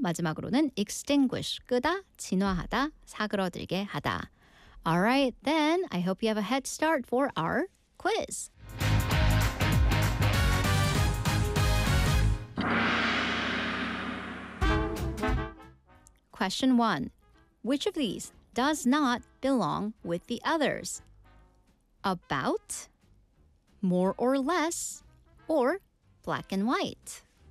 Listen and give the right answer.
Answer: 확실한 흑과 백, black and white이 답이었습니다.